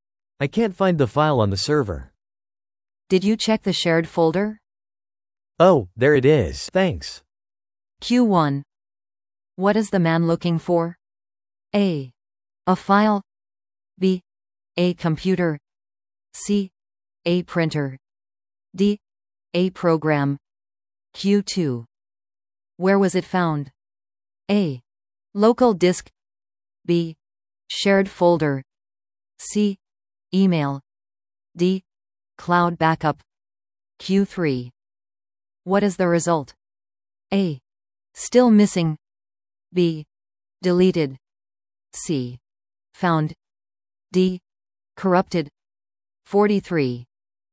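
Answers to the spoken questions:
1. A: A file.
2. B: Shared folder.
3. C: Found.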